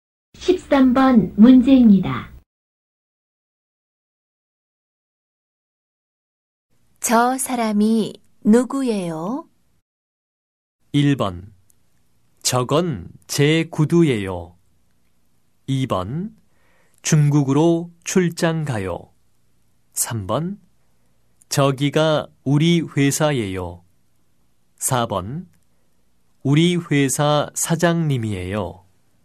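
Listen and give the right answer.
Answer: 4: 우리 회사 사장님이에요.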